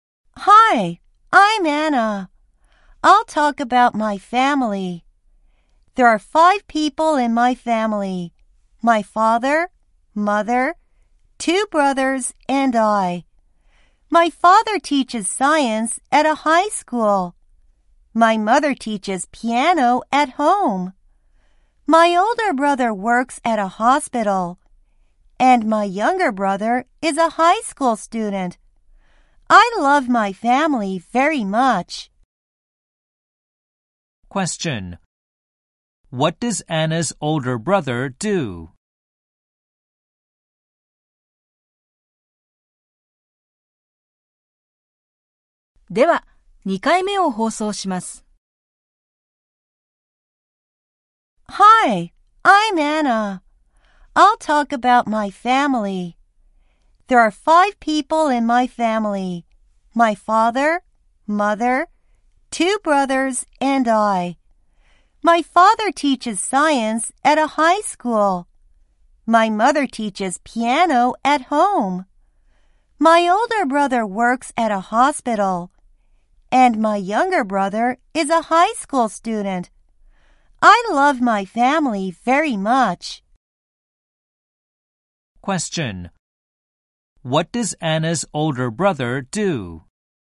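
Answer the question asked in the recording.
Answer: He works at a hospital.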